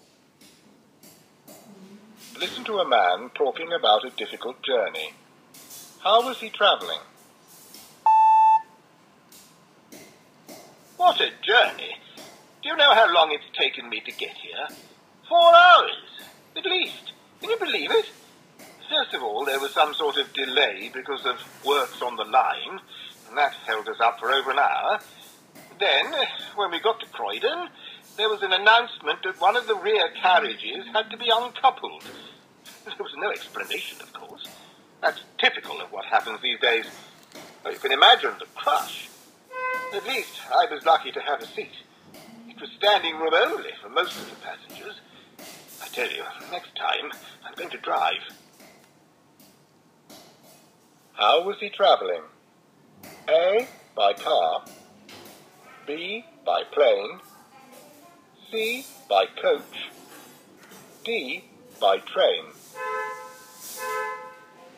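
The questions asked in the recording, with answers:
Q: How was he travelling?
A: D: By train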